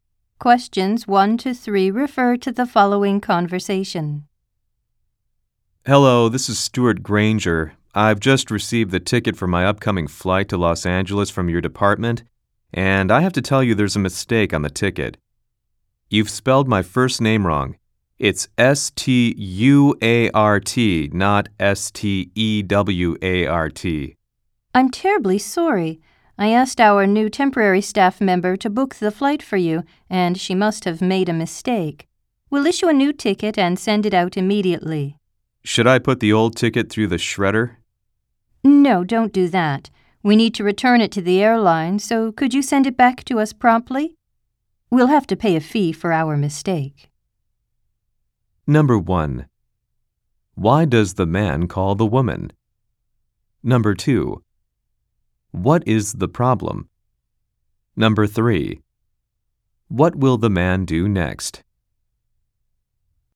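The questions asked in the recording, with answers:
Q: Why does the man call the woman?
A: To report a mistake on his flight ticket

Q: What is the problem?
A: His first name is spelled wrong on the ticket

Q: What will the man do next?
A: Send the old ticket back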